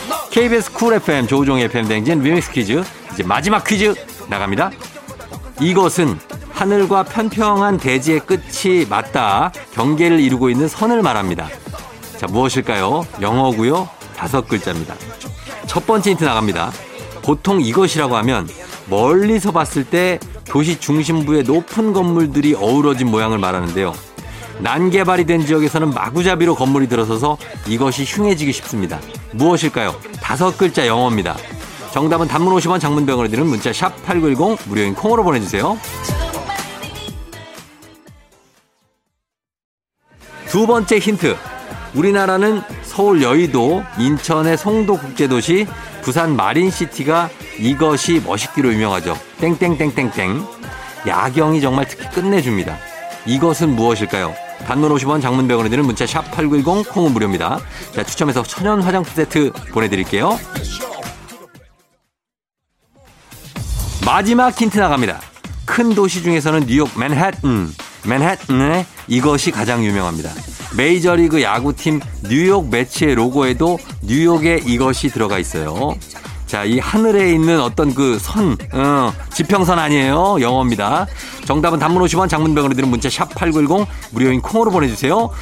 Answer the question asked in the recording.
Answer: 정답은 바로 두구두구두구두구두구두구두구두구두구 스카이라인입니다.